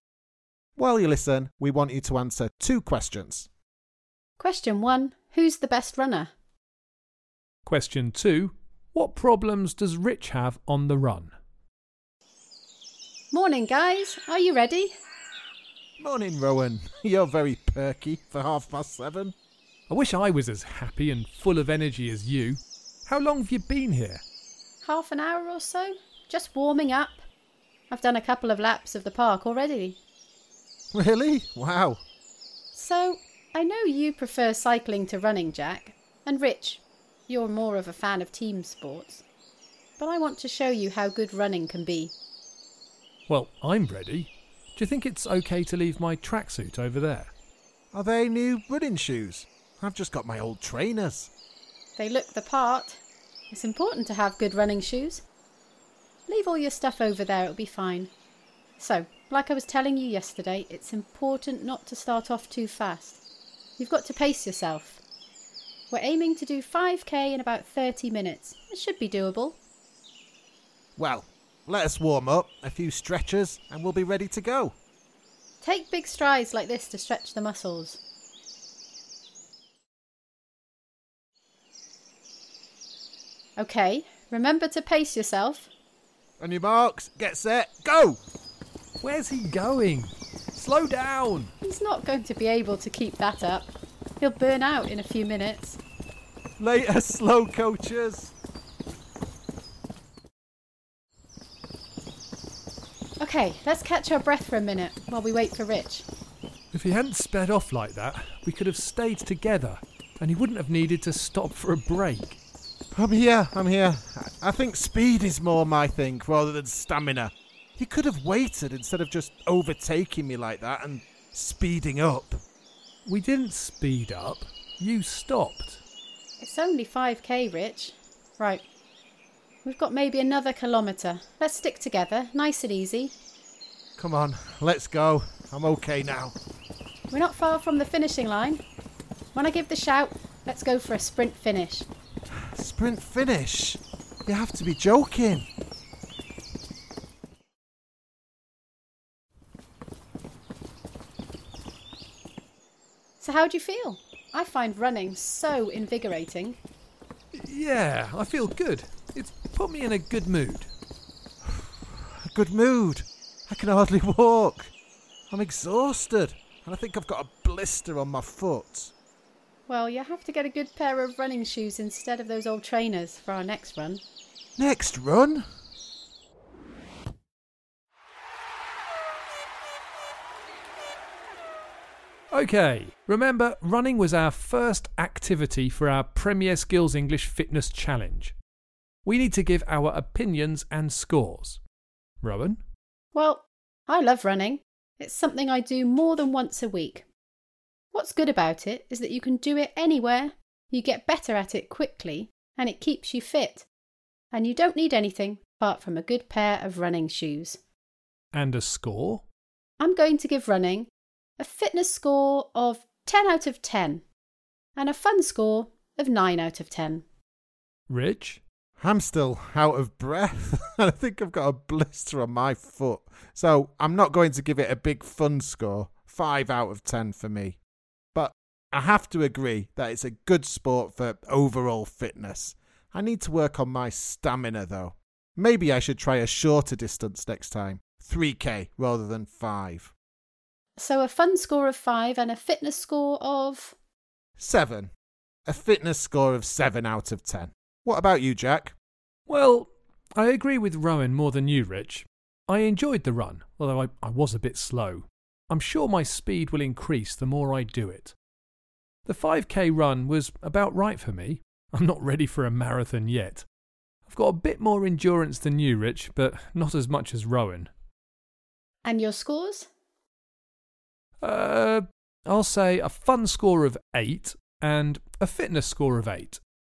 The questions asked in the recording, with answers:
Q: who's the best runner?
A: Well, the answer to that, without a shadow of a doubt, is Rowan.

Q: what problems does Rich have on the run?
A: Well, he didn't have good footwear.